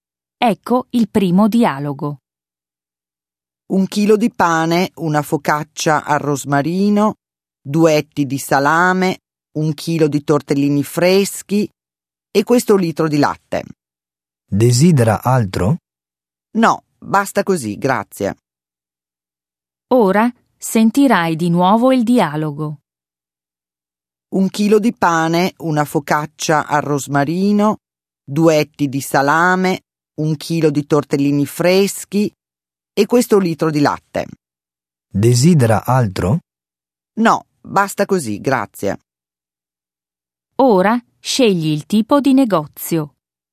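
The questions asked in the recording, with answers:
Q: Ora scegli il tipo di negozio.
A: alimentari (negozio di alimentari)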